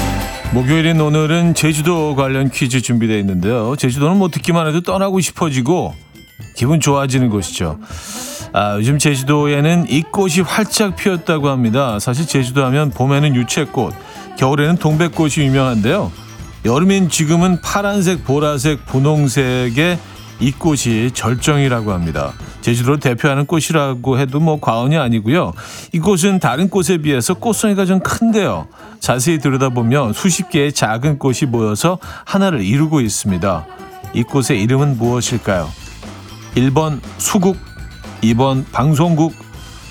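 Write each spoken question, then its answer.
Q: 이 꽃의 이름은 무엇일까요?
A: 1번: 수국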